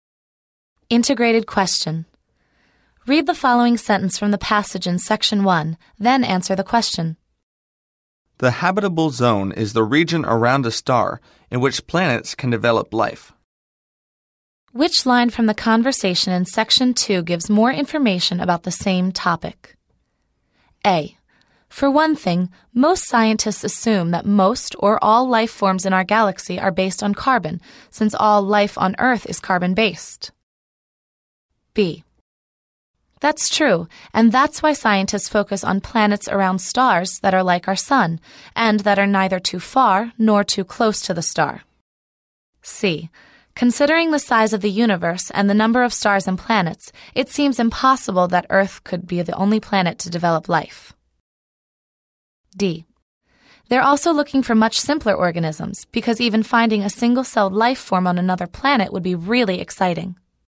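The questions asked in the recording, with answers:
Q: Which line from the conversation in section 2 gives more information about the same topic?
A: B: That's true, and that's why scientists focus on planets around stars that are like our sun, and that are neither too far nor too close to the star.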